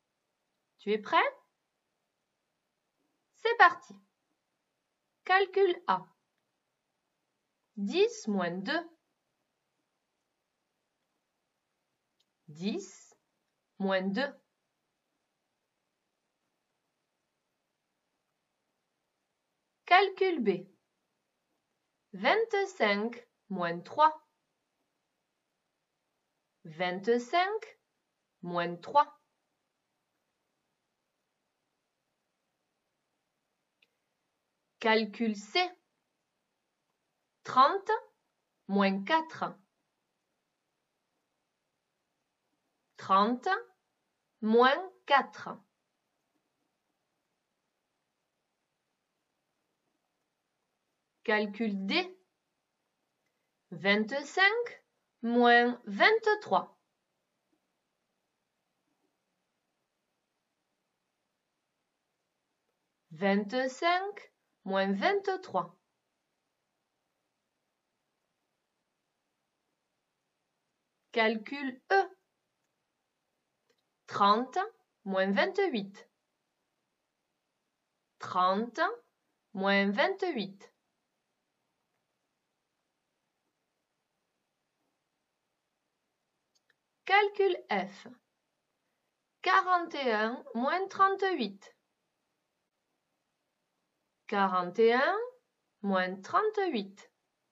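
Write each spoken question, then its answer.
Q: 25 moins 3.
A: 22

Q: 30 moins 4.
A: 26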